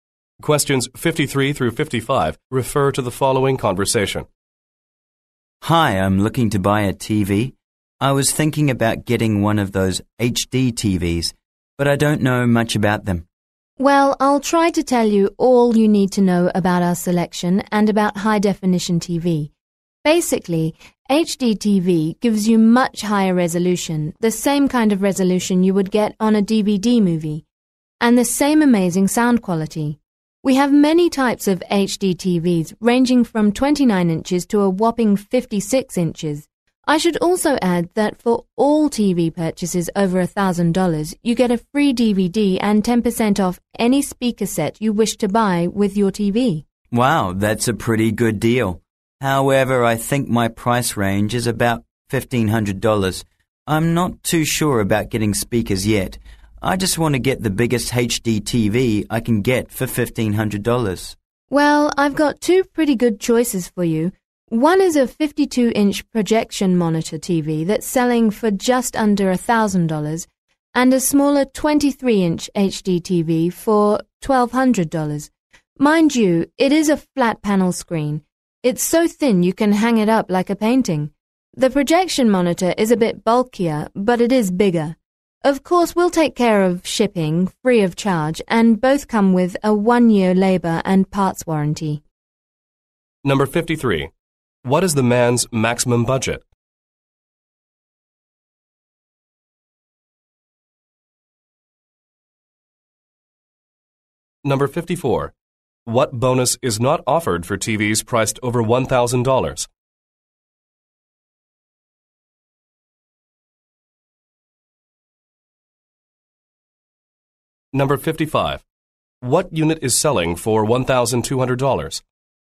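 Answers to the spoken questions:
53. $1,500
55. The 23-inch flat panel HD TV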